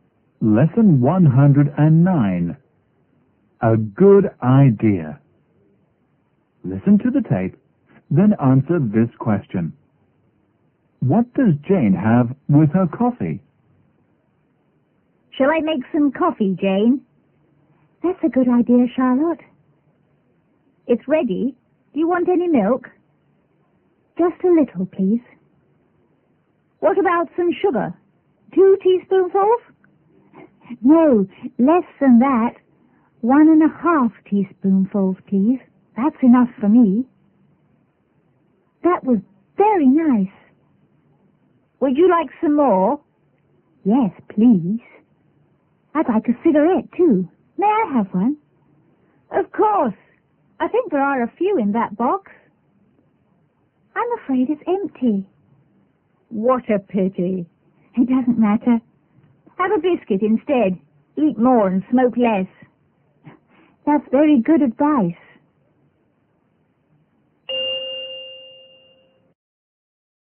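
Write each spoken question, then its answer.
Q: What does Jane have with her coffee?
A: A little milk and one and a half teaspoonfuls of sugar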